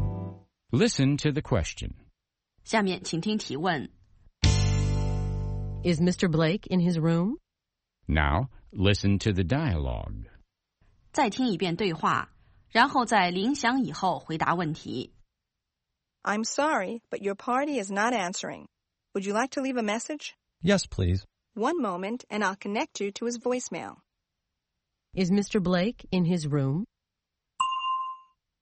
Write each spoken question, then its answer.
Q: Is Mr. Blake in his room?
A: No, he isn't.